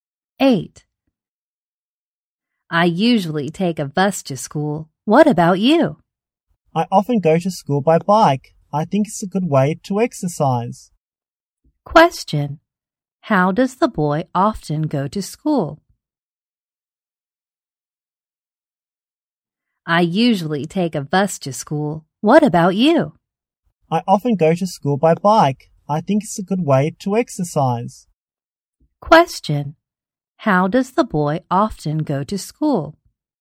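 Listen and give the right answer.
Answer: By bike.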